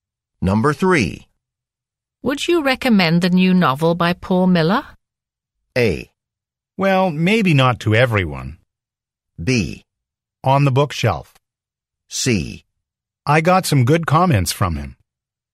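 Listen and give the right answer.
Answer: A: Well, maybe not to everyone.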